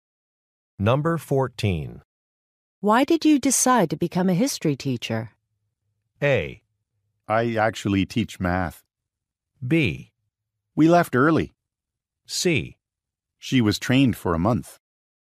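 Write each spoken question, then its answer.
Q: Why did you decide to become a history teacher?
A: A: I actually teach math.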